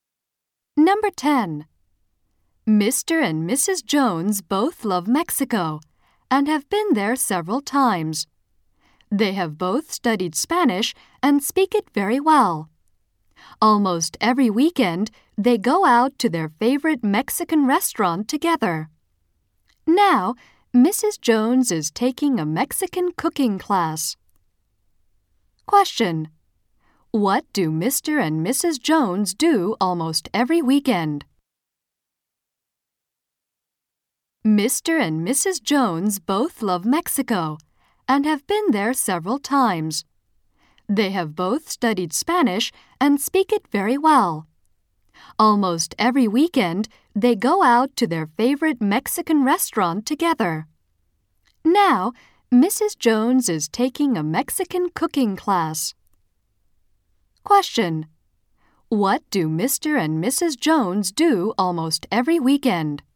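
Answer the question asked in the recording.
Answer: They go out to their favorite Mexican restaurant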